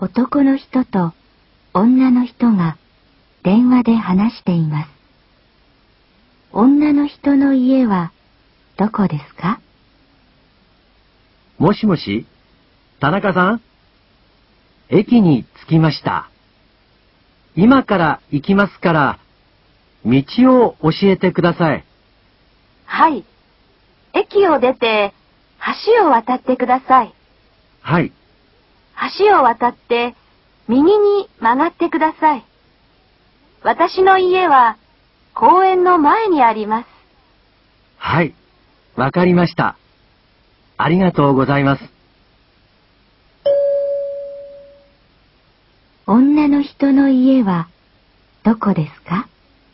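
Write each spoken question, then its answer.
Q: 女の人の家はどこですか?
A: 橋を渡って右に曲がったところ、公園の前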